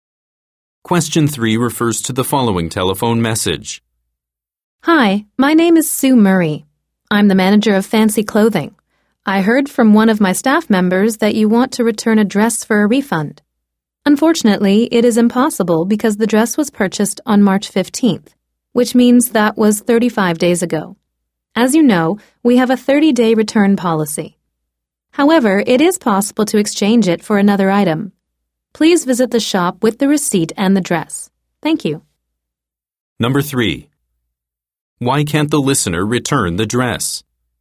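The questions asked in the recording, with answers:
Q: Why can't the listener return the dress?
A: It was bought 35 days ago, past the 30-day return policy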